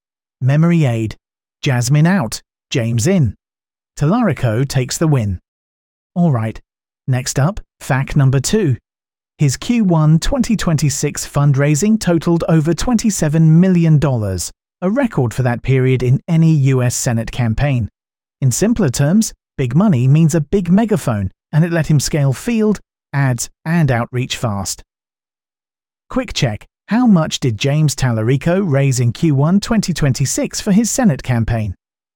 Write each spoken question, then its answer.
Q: how much did James Tallarico raise in Q1 2026 for his Senate campaign?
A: Correct answer, over $27 million.